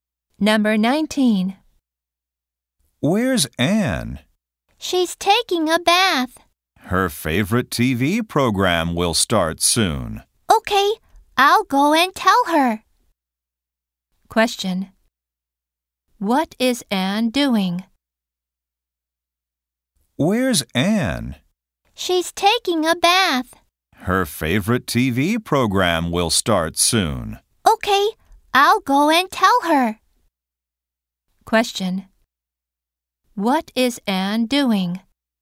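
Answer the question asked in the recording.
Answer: Taking a bath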